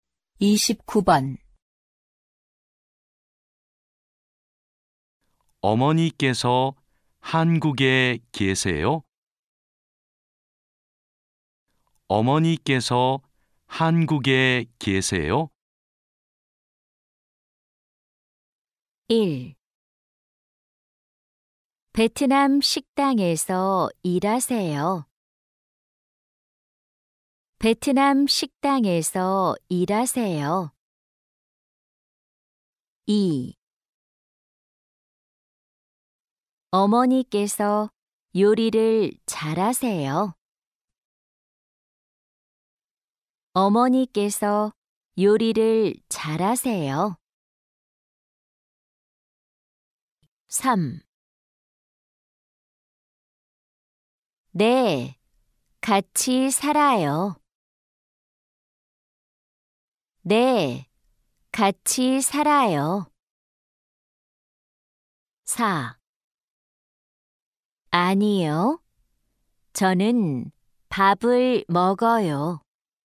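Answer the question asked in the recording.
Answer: 3: 네, 같이 살아요.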